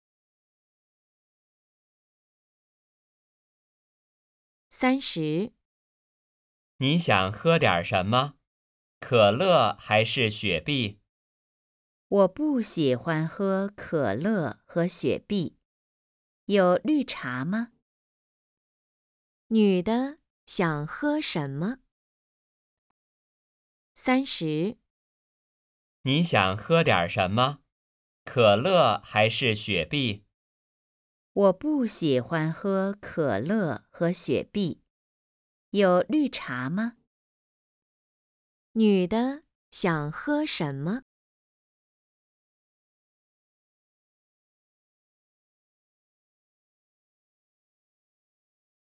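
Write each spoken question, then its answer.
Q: 女的想喝什么?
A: 绿茶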